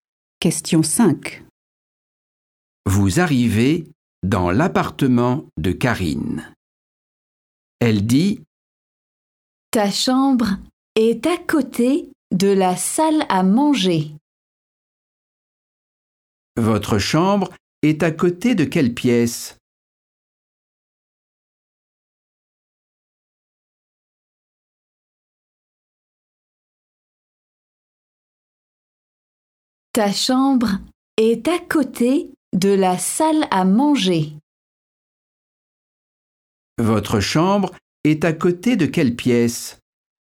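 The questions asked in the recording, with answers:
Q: Votre chambre est à côté de quelle pièce ?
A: la salle à manger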